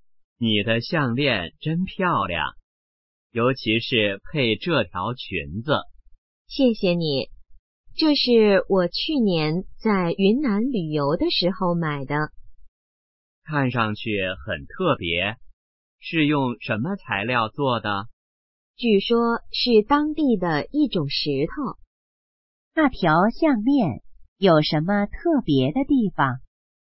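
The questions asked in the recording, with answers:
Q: 那条项链有什么特别的地方?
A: 是用当地的一种石头做的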